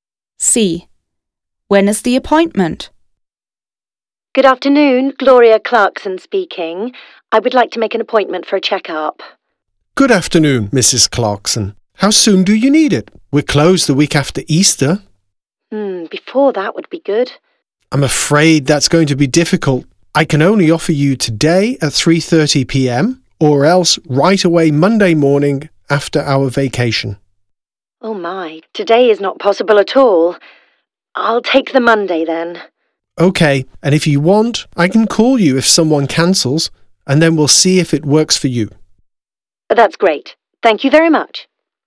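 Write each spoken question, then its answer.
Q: When is the appointment?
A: Monday morning after the Easter vacation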